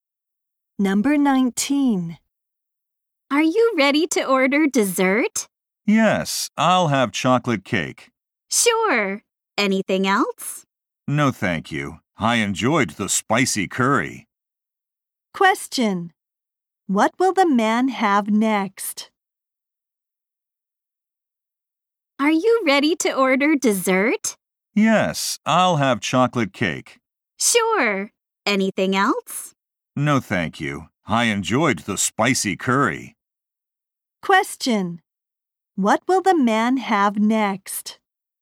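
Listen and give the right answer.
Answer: Chocolate cake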